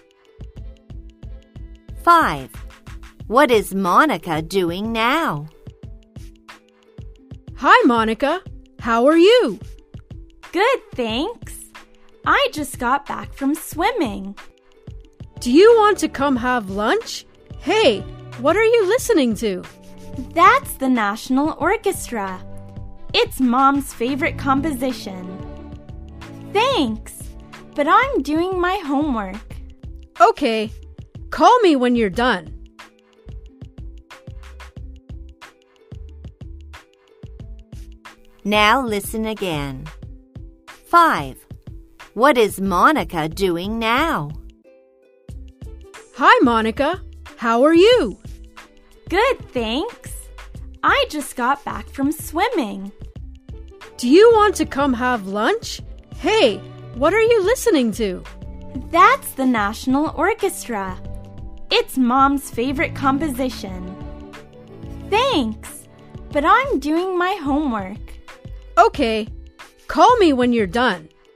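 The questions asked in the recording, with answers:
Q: What is Monica doing now?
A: her homework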